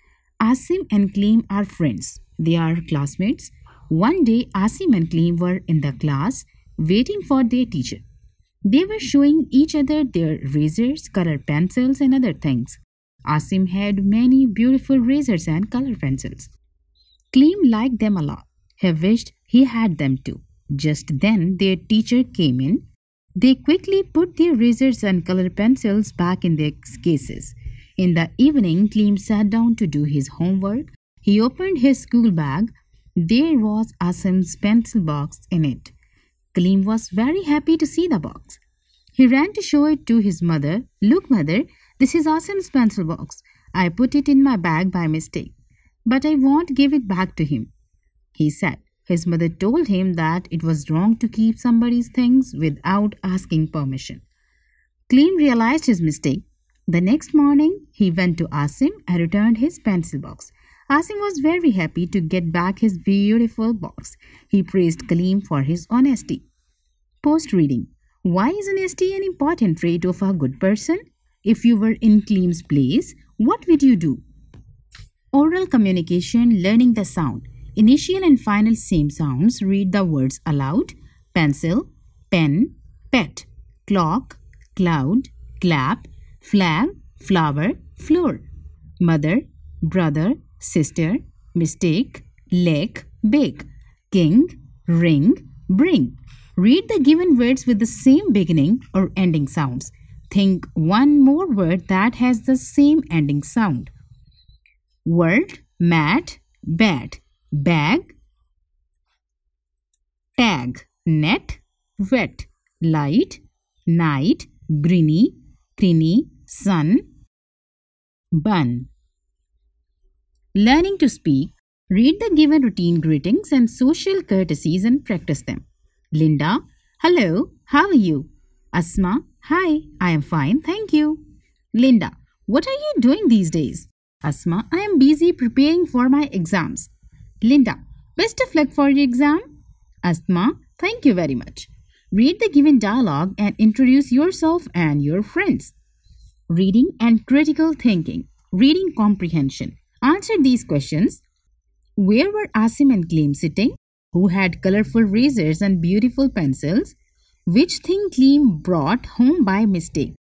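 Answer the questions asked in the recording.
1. In the class
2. Asim
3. Asim's pencil box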